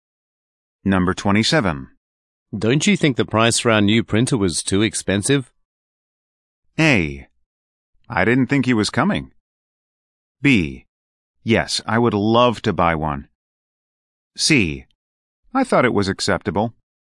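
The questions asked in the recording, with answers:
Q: Don't you think the price for our new printer was too expensive?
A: C: I thought it was acceptable.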